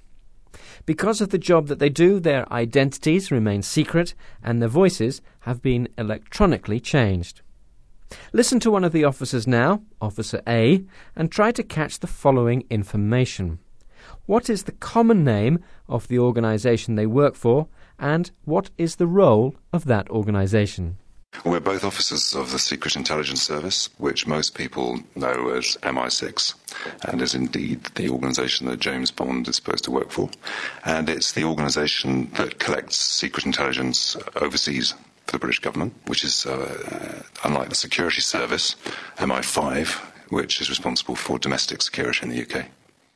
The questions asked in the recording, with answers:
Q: What is the common name of the organisation they work for, and what is the role of that organisation?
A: They work for the Secret Intelligence Service, which is commonly known as MI6.